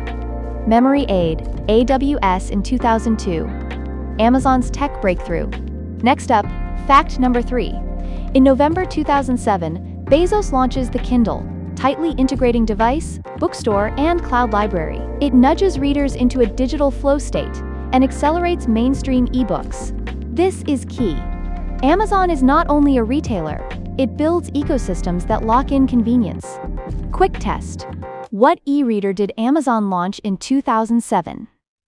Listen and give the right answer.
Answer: Correct answer, Kindle.